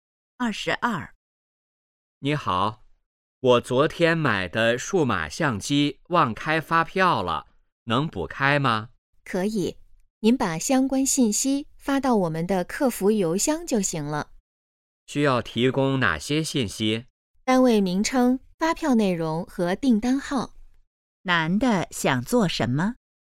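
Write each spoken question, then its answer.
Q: 男的想做什么?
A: 补开发票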